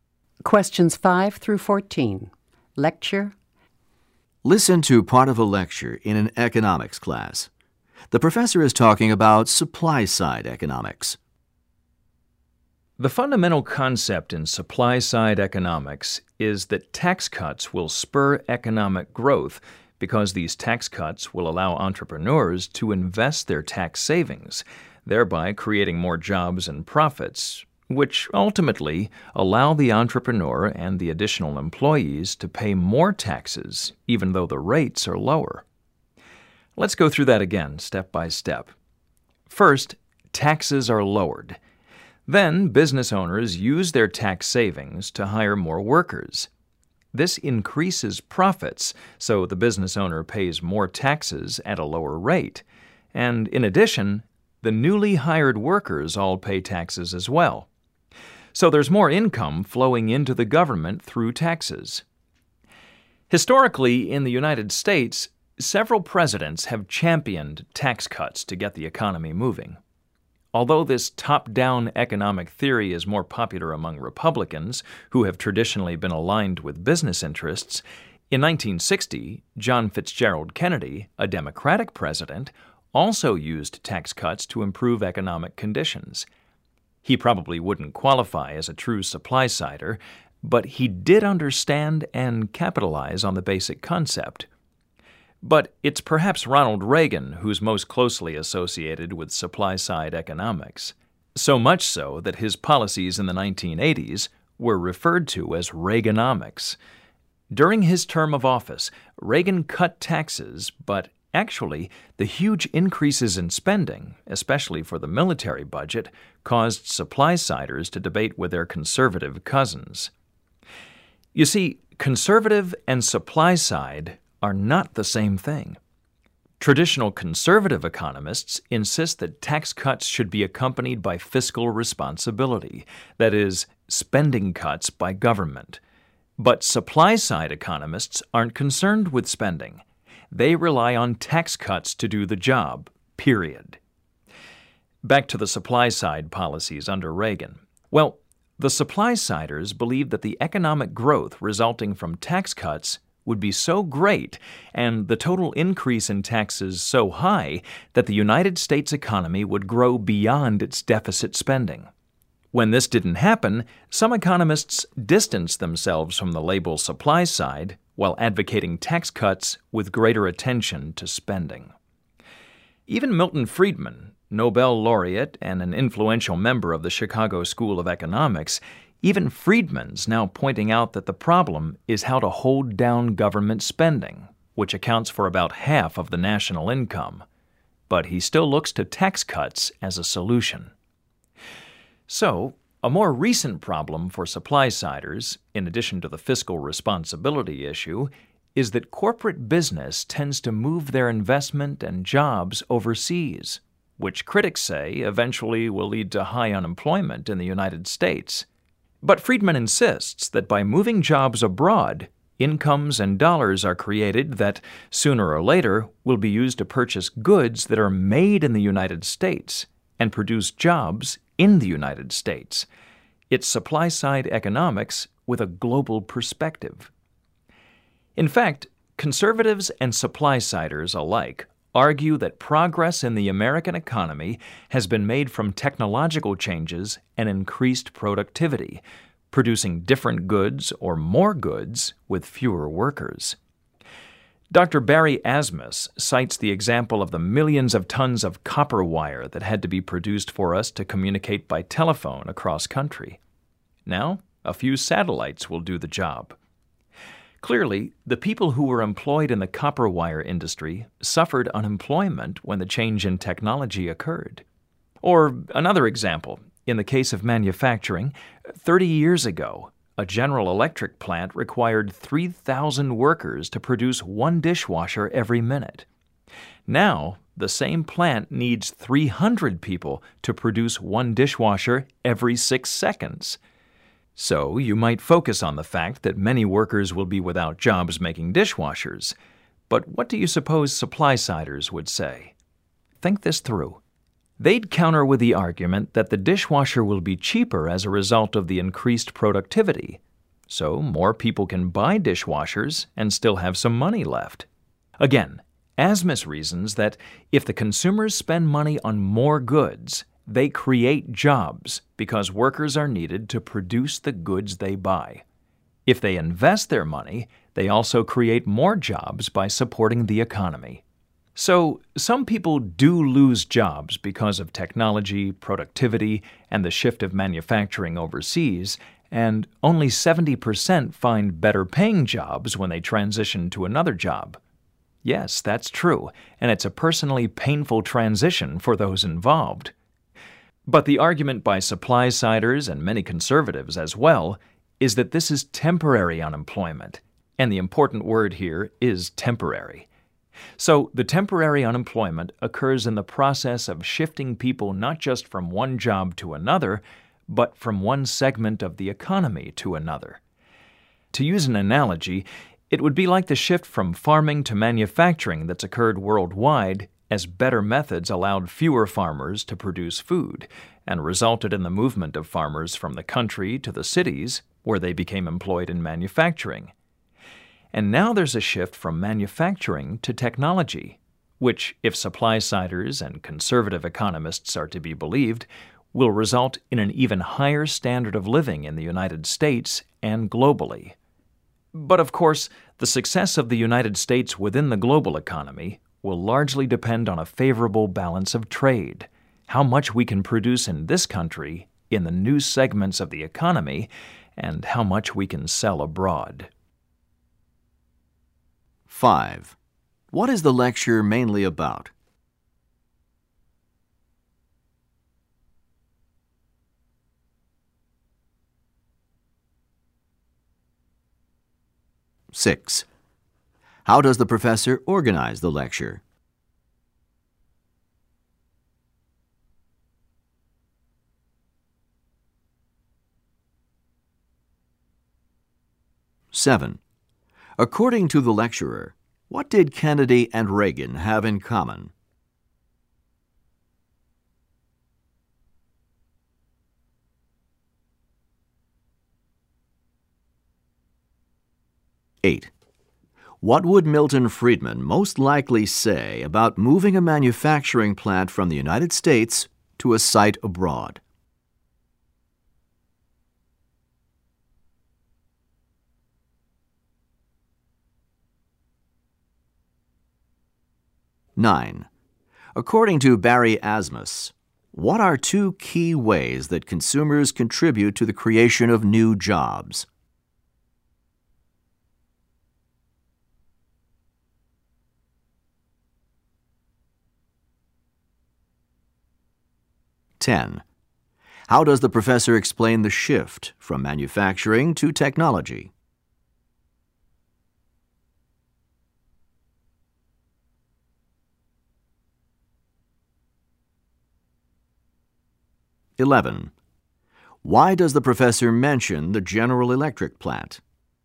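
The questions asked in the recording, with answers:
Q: What is the lecture mainly about?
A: Supply-side economics

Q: According to the lecturer, what did Kennedy and Reagan have in common?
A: Both used tax cuts to improve the economy

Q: What would Milton Friedman most likely say about moving a manufacturing plant from the United States to a site abroad?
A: It creates incomes abroad that will eventually buy US goods and create US jobs

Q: According to Barry Asmus, what are two key ways that consumers contribute to the creation of new jobs?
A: By spending money on more goods and by investing their money

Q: How does the professor explain the shift from manufacturing to technology?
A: By comparing it to the earlier shift from farming to manufacturing

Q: Why does the professor mention the General Electric plant?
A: As an example of technology increasing productivity with fewer workers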